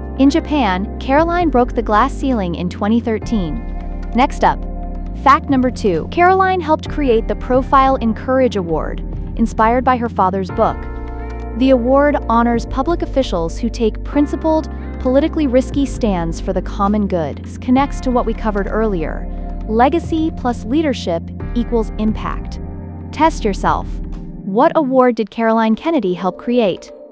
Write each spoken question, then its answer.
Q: What award did Caroline Kennedy help create?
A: The Profile in Courage Award.